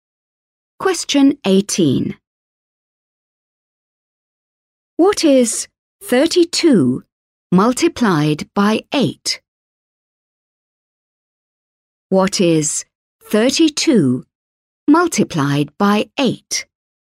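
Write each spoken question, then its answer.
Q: What is 32 multiplied by 8?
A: 256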